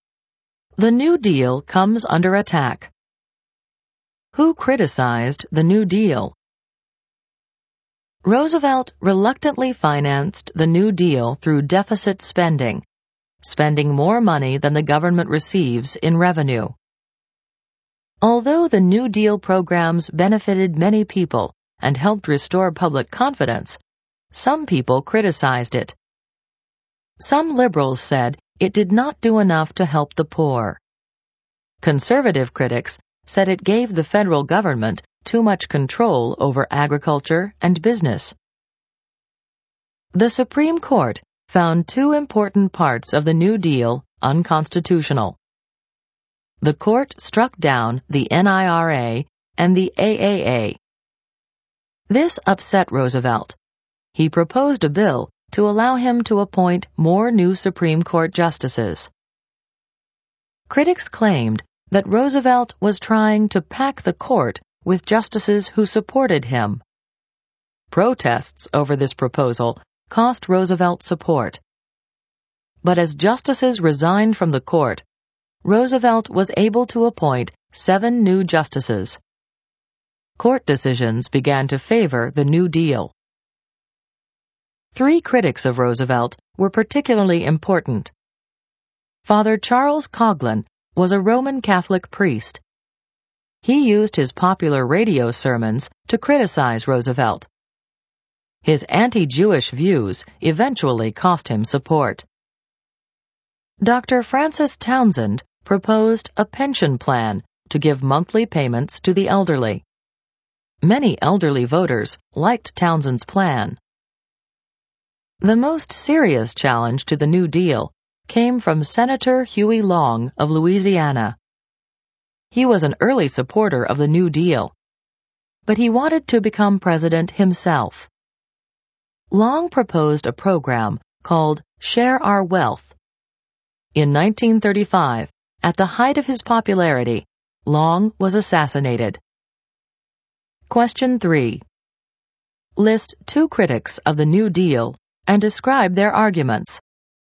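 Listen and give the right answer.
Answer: For example, Father Charles Coughlin criticized Roosevelt in his radio sermons, and Huey Long proposed Share Our Wealth; liberals said it did not do enough for the poor, and conservatives said it gave the federal government too much control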